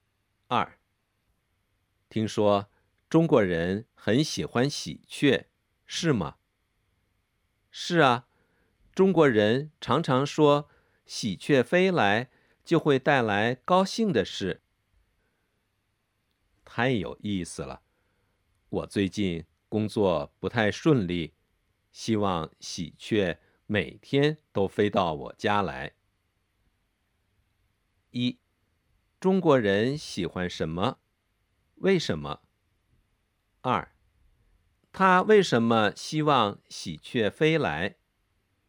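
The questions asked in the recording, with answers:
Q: 中国人喜欢什么?为什么?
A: 喜鹊,因为喜鹊飞来会带来高兴的事

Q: 他为什么希望喜鹊飞来?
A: 因为他最近工作不太顺利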